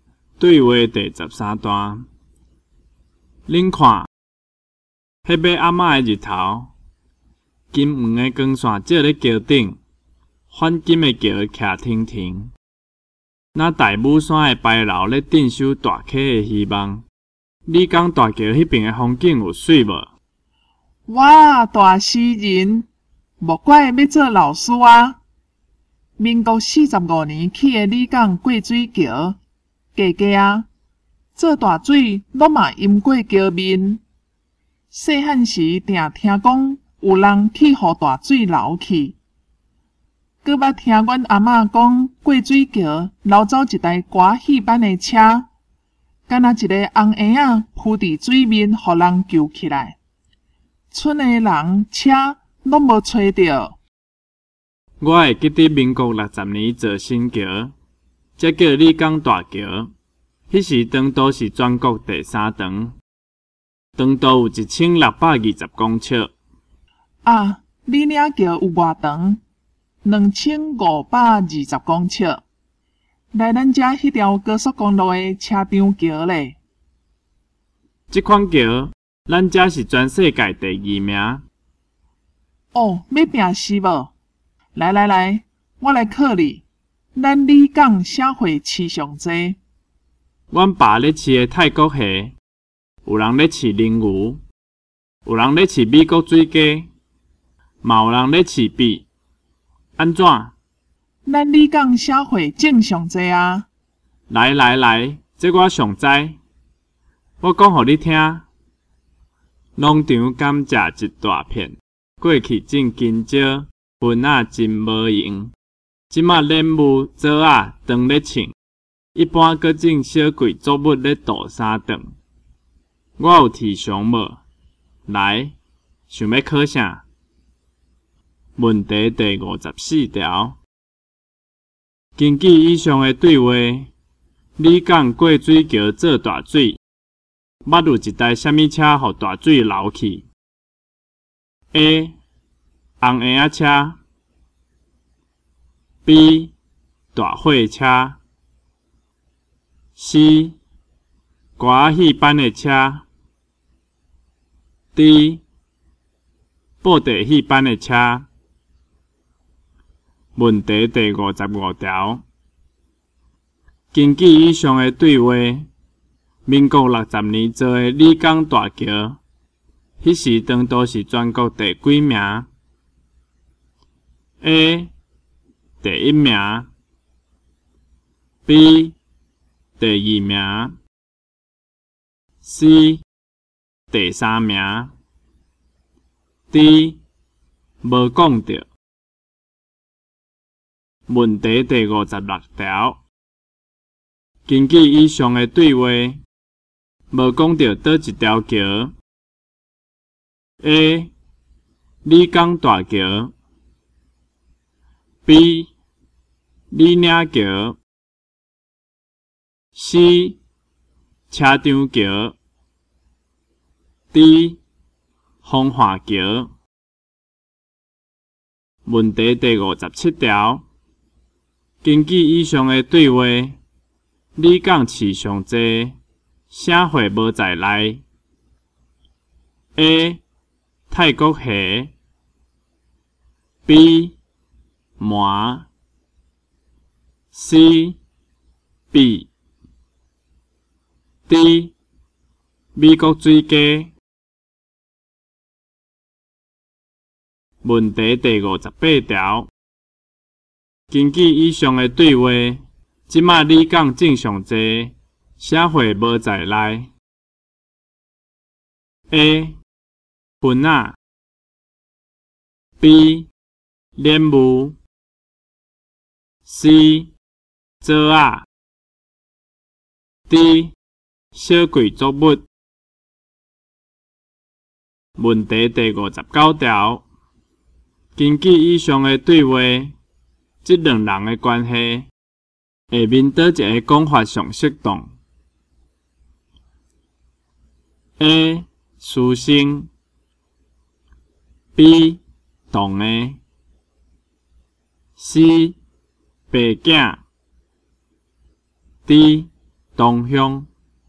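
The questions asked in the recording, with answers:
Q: 根据以上的对话,你讲过水桥做大水,捌有一台啥物车,予大水流去 ?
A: C: 歌戏班的车

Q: 根据以上的对话,民国60年造的李港大桥,迄时长度是全国第几名 ?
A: C: 第三名

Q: 根据以上的对话,无讲到倒一条桥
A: D: 风化桥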